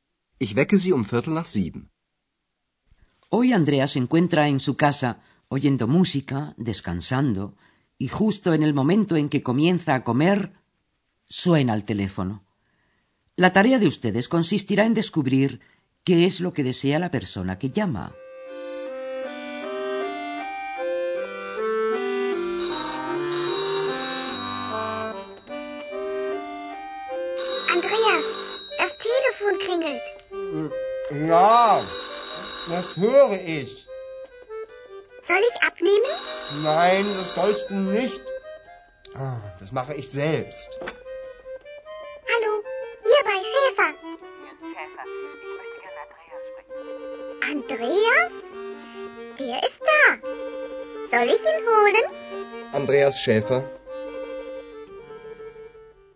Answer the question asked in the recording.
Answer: La persona que llama desea hablar con Andreas.